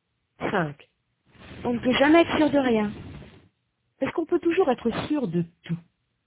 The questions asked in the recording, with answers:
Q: Est-ce qu'on peut toujours être sûr de tout?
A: Non. On ne peut jamais être sûr de rien.